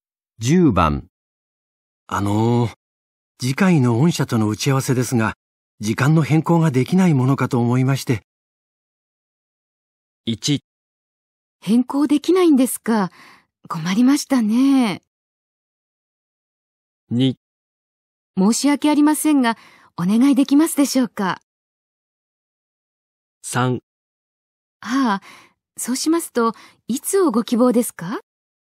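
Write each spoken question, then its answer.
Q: あのー、次回の御社との打ち合わせですが、時間の変更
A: 3: ああ、そうしますと、いつをご希望ですか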